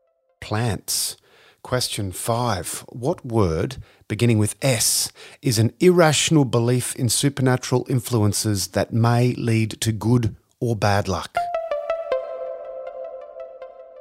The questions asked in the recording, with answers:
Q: What word, beginning with S, is an irrational belief in supernatural influences that may lead to good or bad luck?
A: Superstition.